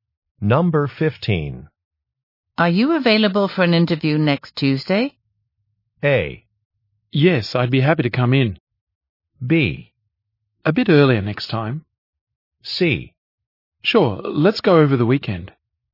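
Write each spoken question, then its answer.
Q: Are you available for an interview next Tuesday?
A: A: Yes, I'd be happy to come in.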